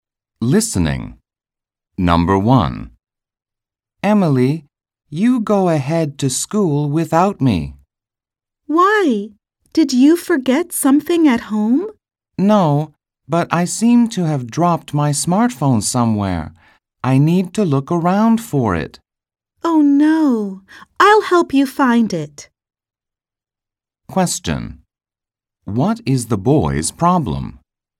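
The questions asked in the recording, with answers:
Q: What is the boy's problem?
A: He dropped his smartphone somewhere (he lost it).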